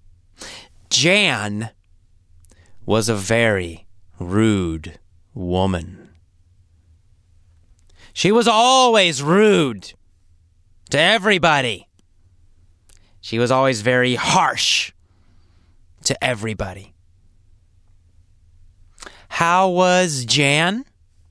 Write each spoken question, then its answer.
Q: How was Jan?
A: Jan was rude. Jan was rude and harsh to everyone.